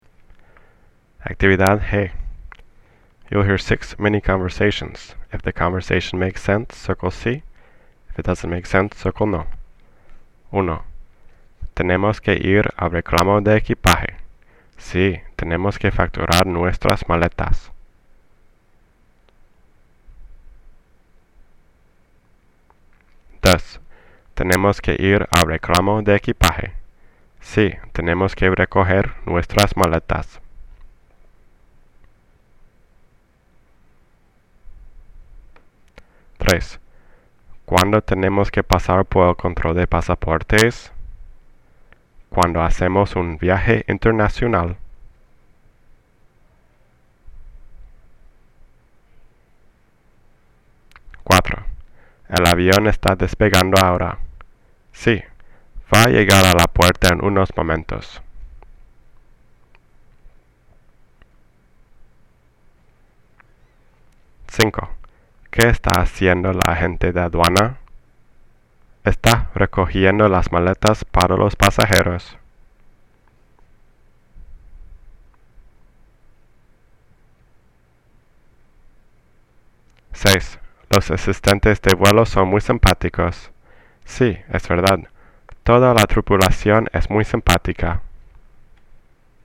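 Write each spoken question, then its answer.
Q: Tenemos que ir al reclamo de equipaje.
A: no

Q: Tenemos que ir al reclamo de equipaje.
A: sí

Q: ¿Cuándo tenemos que pasar por el control de pasaportes?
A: sí

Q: El avión está despegando ahora.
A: no

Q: ¿Qué está haciendo la agente de aduana?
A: no

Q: Los asistentes de vuelo son muy simpáticos.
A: sí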